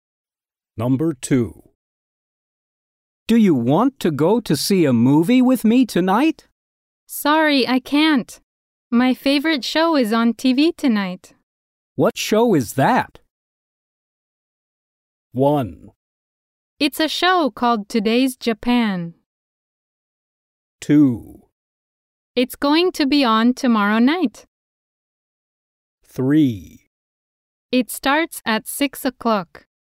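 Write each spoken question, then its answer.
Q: What show is that?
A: 1: It's a show called Today's Japan.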